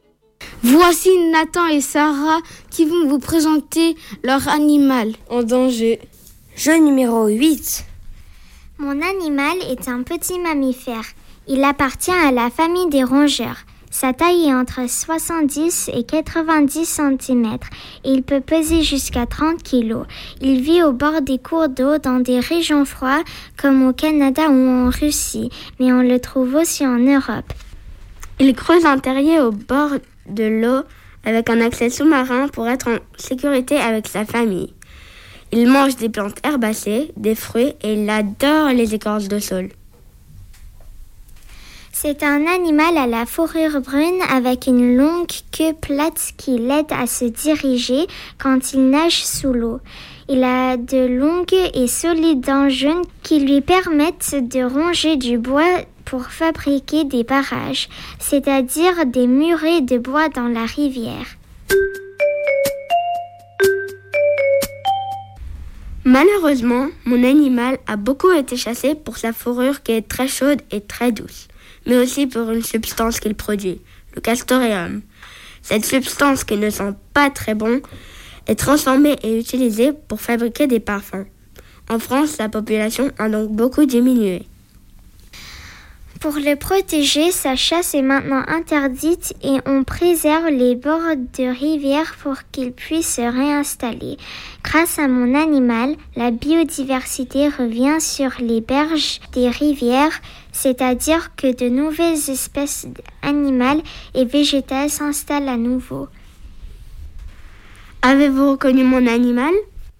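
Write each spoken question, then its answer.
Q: Avez-vous reconnu mon animal ?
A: le castor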